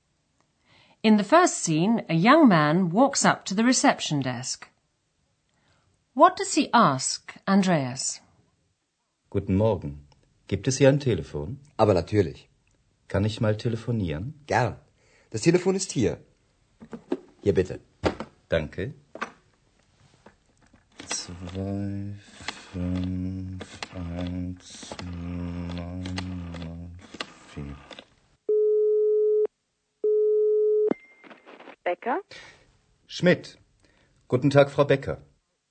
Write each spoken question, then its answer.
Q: What does he ask, Andreas?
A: The young man asked if there was a telephone he could use.